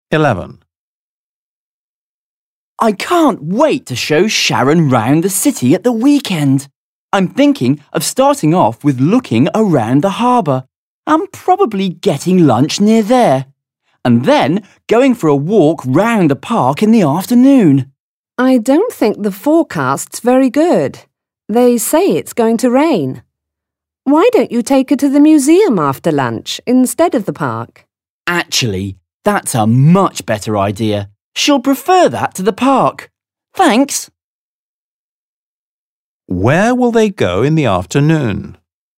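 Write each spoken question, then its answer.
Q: Where will they go in the afternoon?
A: To the museum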